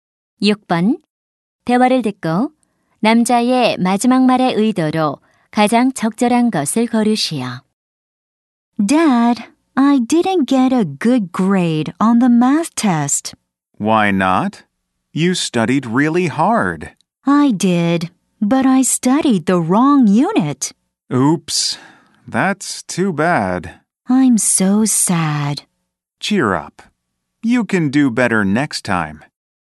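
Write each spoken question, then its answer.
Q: 대화를 듣고 남자의 마지막 말의 의도로 가장 적절한 것을 고르시오.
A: 격려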